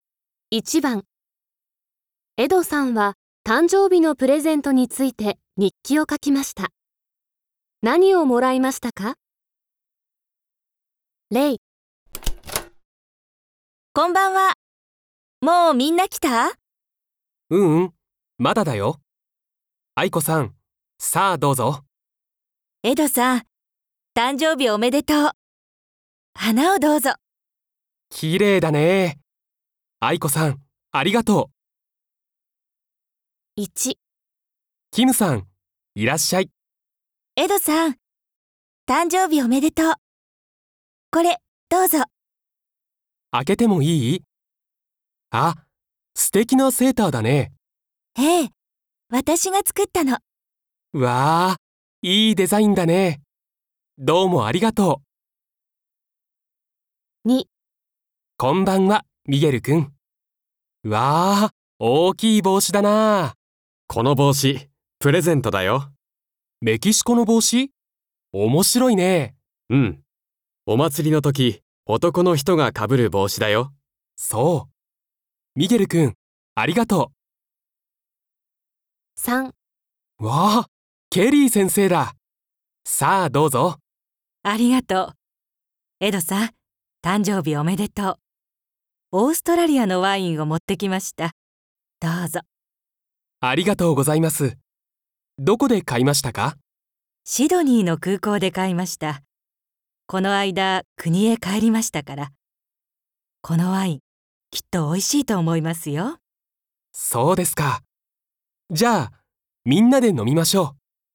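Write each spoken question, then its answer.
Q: 何をもらいましたか?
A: キムさんが作ったセーター

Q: 何をもらいましたか?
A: メキシコの大きい帽子

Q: 何をもらいましたか?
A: オーストラリアのワイン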